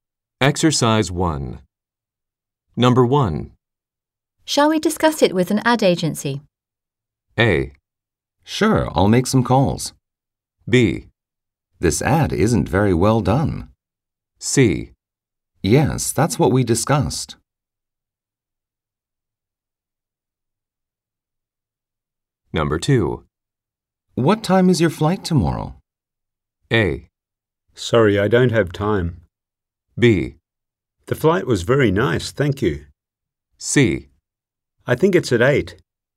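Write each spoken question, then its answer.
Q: Shall we discuss it with an ad agency?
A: A: Sure, I'll make some calls.

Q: What time is your flight tomorrow?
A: C: I think it's at 8.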